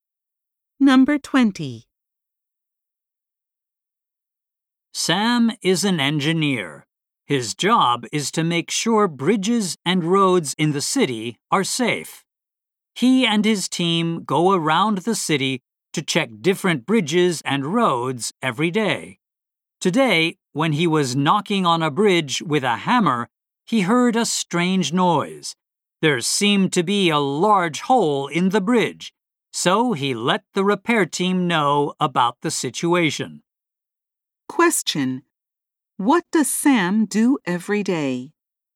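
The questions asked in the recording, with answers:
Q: What does Sam do every day?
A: He checks bridges and roads around the city with his team.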